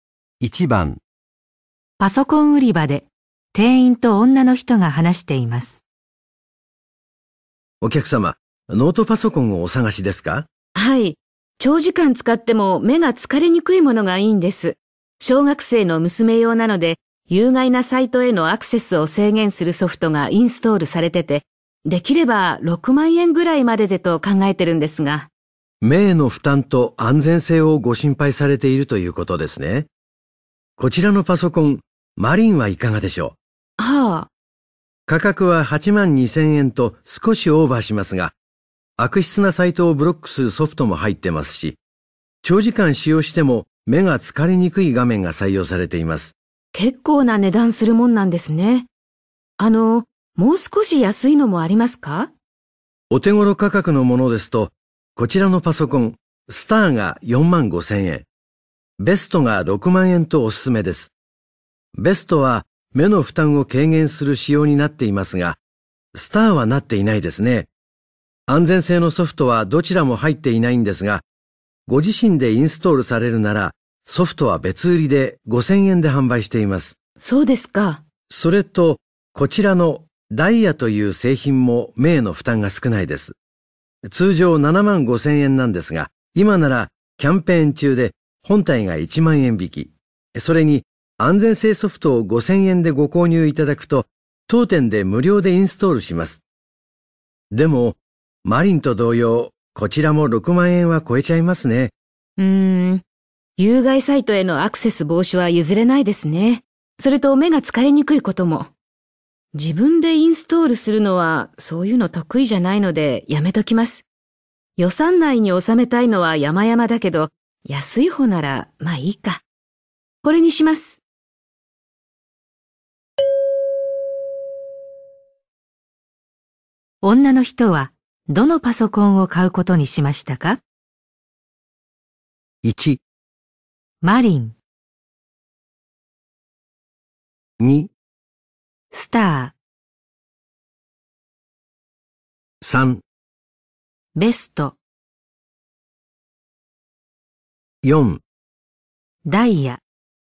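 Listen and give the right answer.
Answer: 4: ダイヤ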